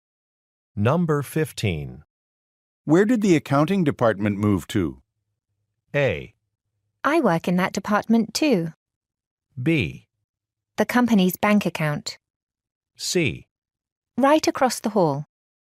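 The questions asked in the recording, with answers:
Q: Where did the accounting department move to?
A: C: Right across the hall.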